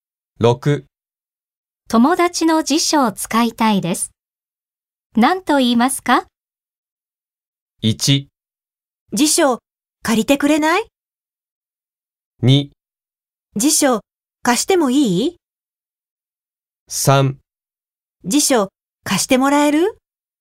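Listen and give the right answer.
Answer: 3: 辞書貸してもらえる?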